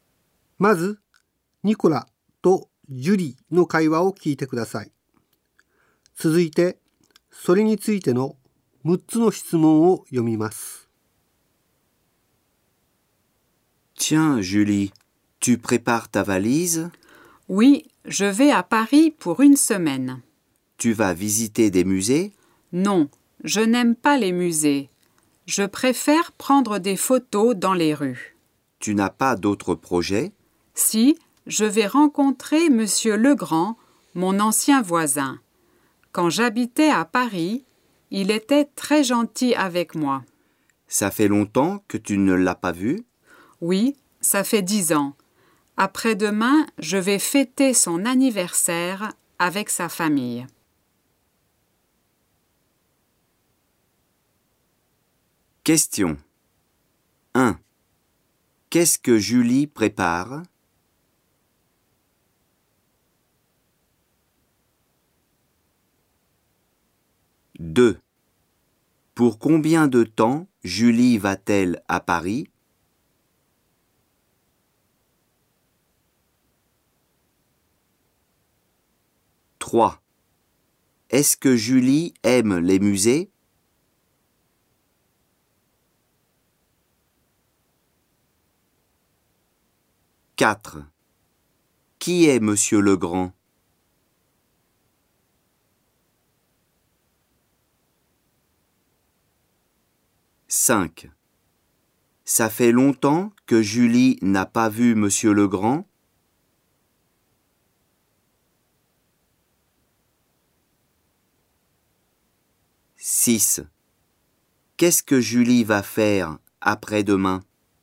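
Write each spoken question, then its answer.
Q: Qu'est-ce que Julie prépare?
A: Sa valise

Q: Pour combien de temps Julie va-t-elle à Paris?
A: Pour une semaine

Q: Est-ce que Julie aime les musées?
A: Non, elle n'aime pas les musées

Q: Qui est Monsieur Legrand?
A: Son ancien voisin

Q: Ça fait longtemps que Julie n'a pas vu Monsieur Legrand?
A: Oui, ça fait 10 ans

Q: Qu'est-ce que Julie va faire après-demain?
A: Elle va fêter l'anniversaire de Monsieur Legrand avec sa famille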